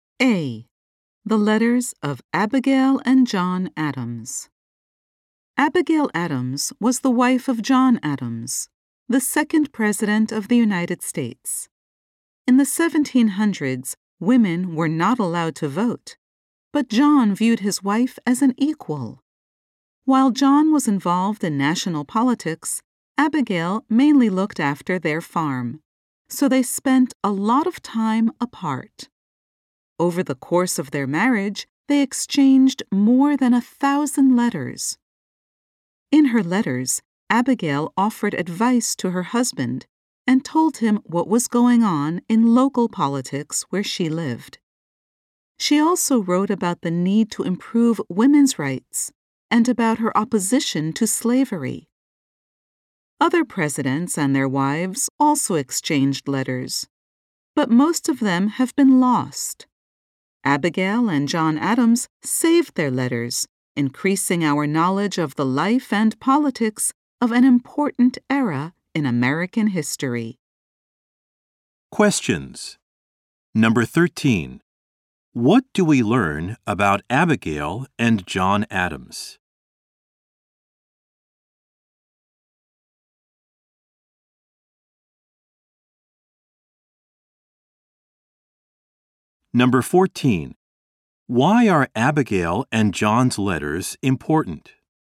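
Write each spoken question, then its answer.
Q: Why are Abigail and John's letters important?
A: They increase our knowledge of the life and politics of an important era in American history.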